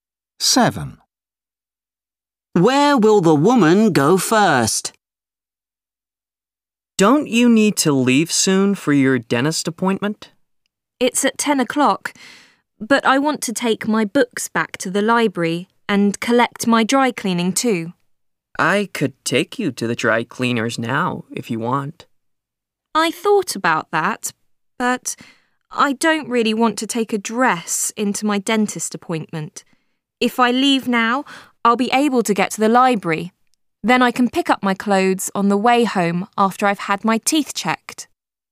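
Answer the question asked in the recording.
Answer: the library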